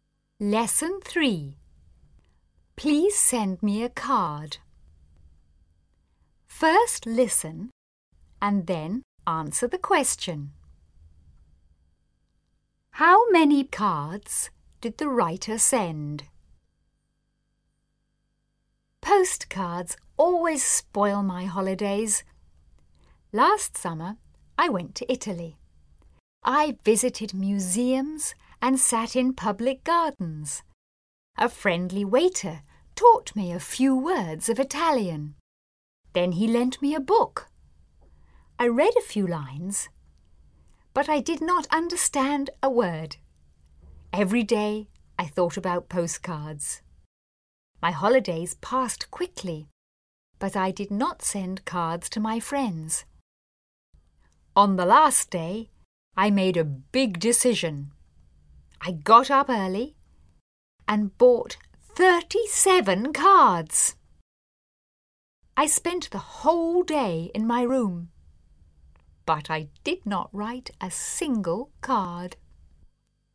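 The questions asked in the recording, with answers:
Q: How many cards did the writer send?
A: None; the writer did not send any cards.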